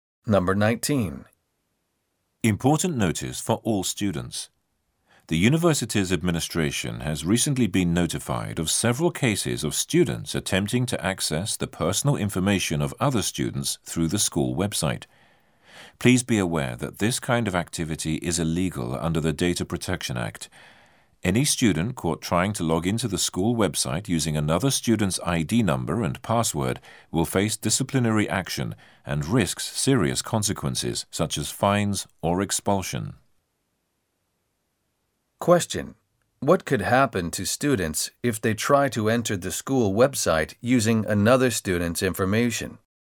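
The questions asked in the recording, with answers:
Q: What could happen to students if they try to enter the school website using another student's information?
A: They will face disciplinary action, such as fines or expulsion.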